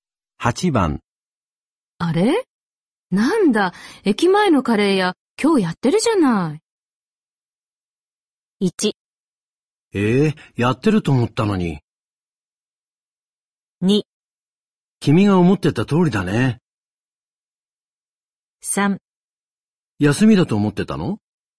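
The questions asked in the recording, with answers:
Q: あれなんだ、駅前のカレー屋、今日やってるじゃな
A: 3: 休みだと思ってたの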